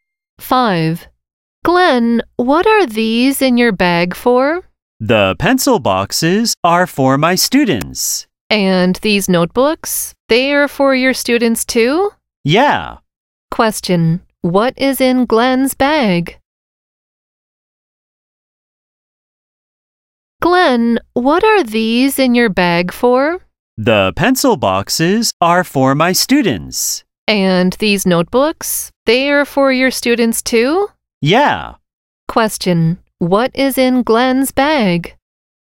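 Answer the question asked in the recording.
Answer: Pencil boxes and notebooks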